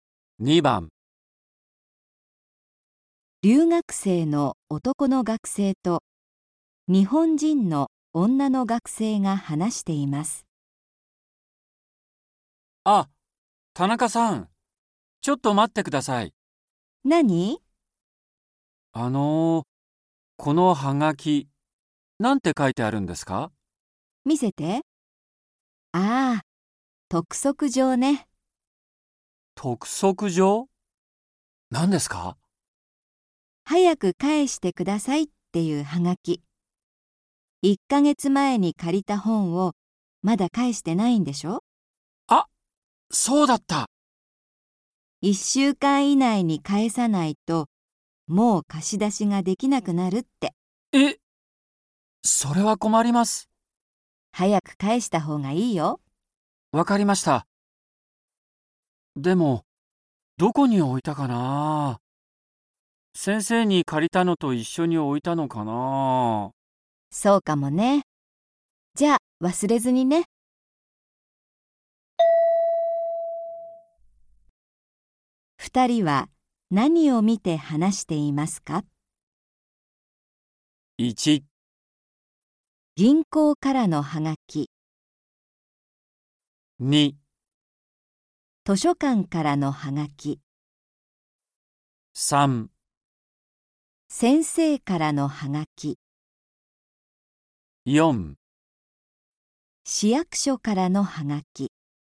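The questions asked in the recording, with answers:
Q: 二人は何を見て話していますか?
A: 2: 図書館からのはがき。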